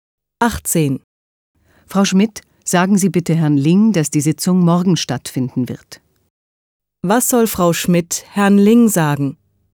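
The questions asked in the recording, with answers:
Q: Was soll Frau Schmidt Herrn Ling sagen?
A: Dass die Sitzung morgen stattfindet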